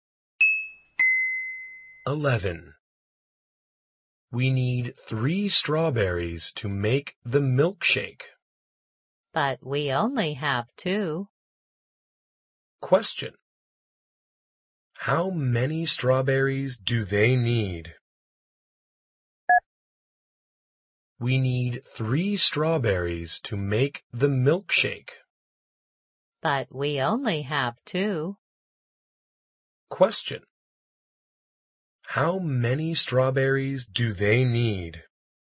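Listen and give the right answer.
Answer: Three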